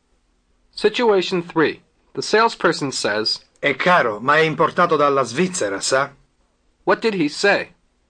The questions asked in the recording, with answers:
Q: What did he say?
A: It's expensive, but it's imported from Switzerland, you know.